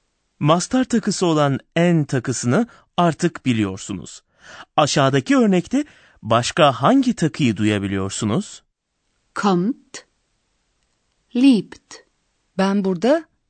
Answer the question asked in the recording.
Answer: t takısı duydum.